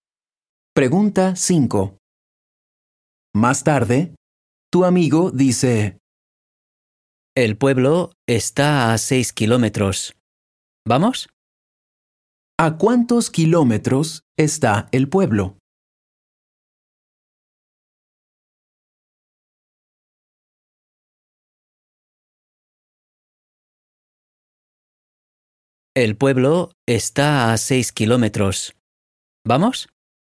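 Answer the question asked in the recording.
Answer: A 6 kilómetros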